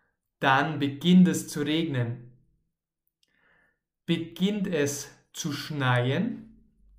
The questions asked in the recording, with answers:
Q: Beginnt es zu schneien?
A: Nein, es beginnt nicht zu schneien, sondern zu regnen.